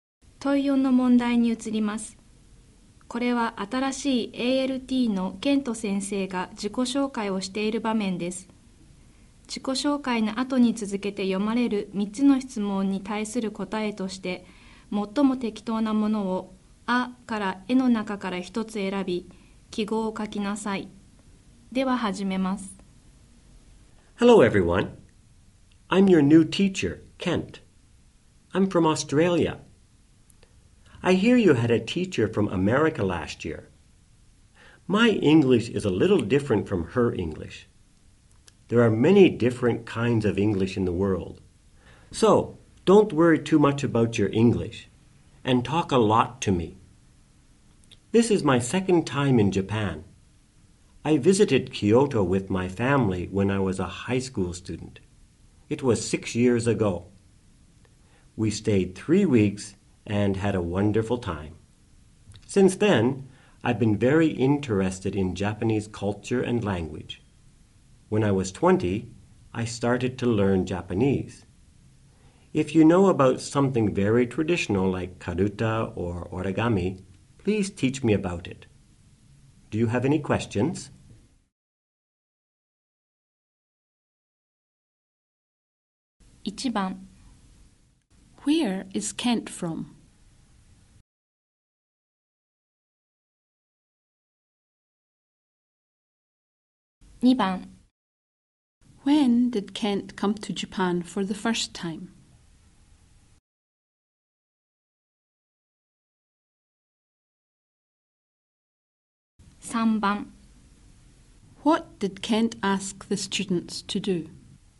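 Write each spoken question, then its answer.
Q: Where is Kent from?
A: Australia

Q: When did Kent come to Japan for the first time?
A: Six years ago, when he was a high school student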